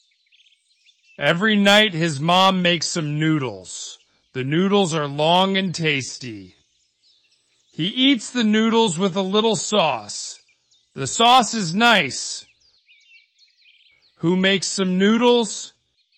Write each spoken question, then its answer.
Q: Who makes some noodles?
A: His mom. His mom makes some noodles.